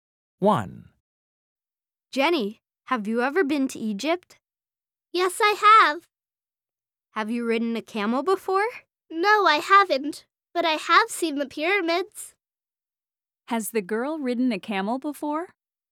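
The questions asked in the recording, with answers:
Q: Has the girl ridden a camel before?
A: No, she hasn't.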